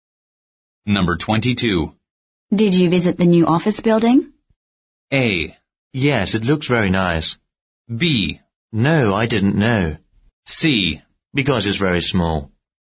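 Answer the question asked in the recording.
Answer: A: Yes, it looks very nice.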